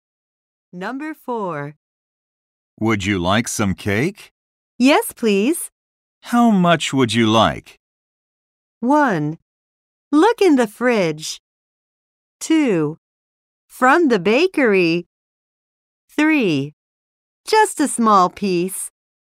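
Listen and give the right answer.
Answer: 3: Just a small piece.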